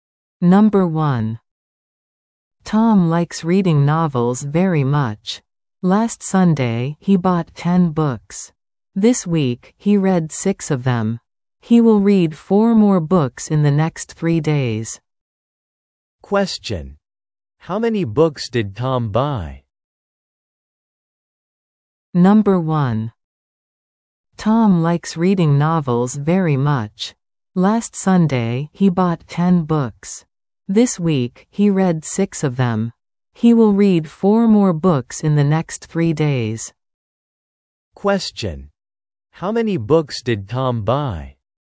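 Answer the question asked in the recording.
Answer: 10 books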